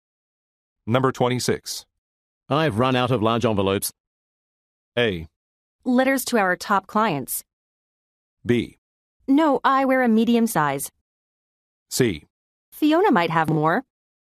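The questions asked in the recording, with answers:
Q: I've run out of large envelopes.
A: C: Fiona might have more.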